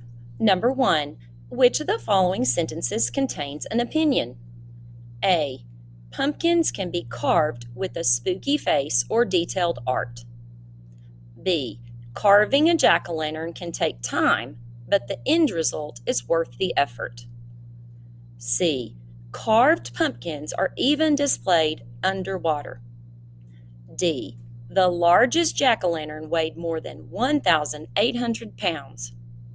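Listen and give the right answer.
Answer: B: Carving a jack-o'-lantern can take time, but the end result is worth the effort.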